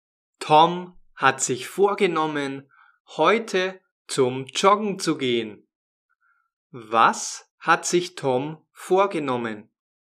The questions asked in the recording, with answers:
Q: Was hat sich Tom vorgenommen?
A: Joggen zu gehen. Er will joggen gehen.